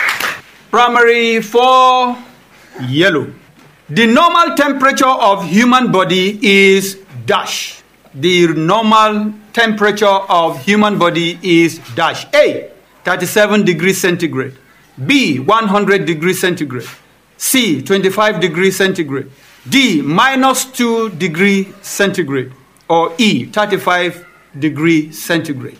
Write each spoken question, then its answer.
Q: The normal temperature of human body is dash.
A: A, 37 degrees centigrade.